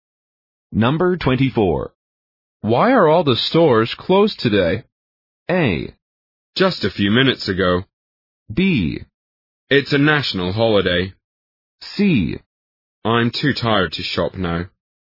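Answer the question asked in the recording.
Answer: B: It's a national holiday.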